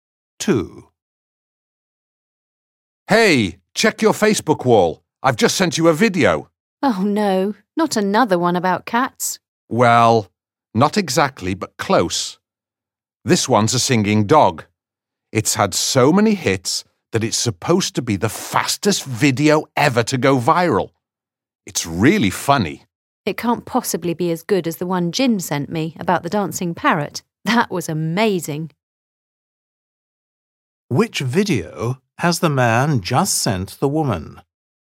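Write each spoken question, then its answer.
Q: Which video has the man just sent the woman?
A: a singing dog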